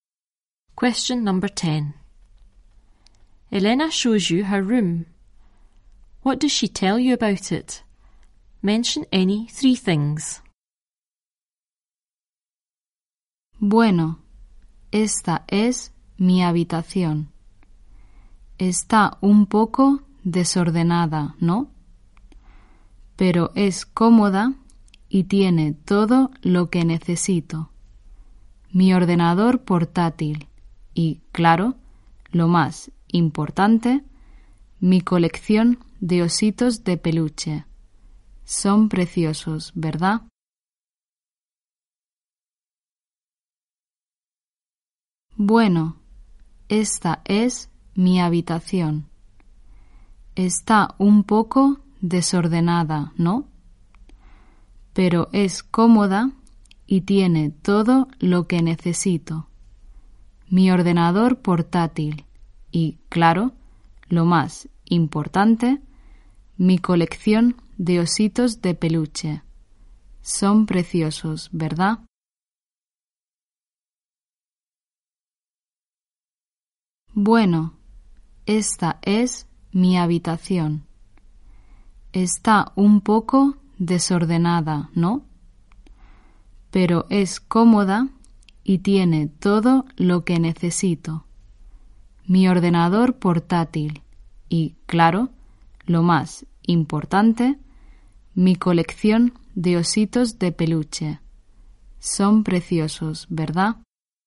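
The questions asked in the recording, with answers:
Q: What does she tell you about it?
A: A bit untidy; comfortable; has everything she needs; her laptop; her teddy bear collection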